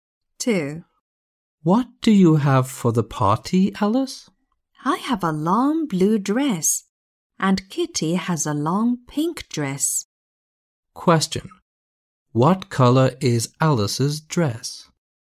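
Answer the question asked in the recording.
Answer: blue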